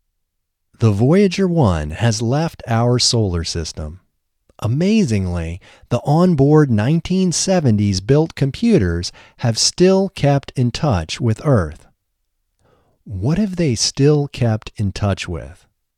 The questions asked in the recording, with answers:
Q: What have they still kept in touch with?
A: They have still kept in touch with Earth.